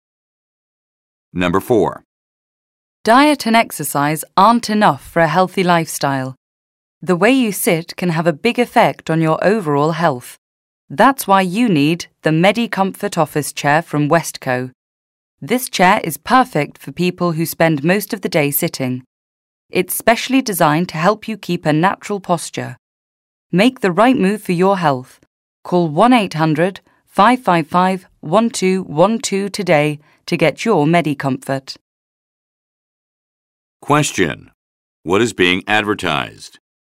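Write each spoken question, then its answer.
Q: What is being advertised?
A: An office chair (the MediComfort chair from Westco)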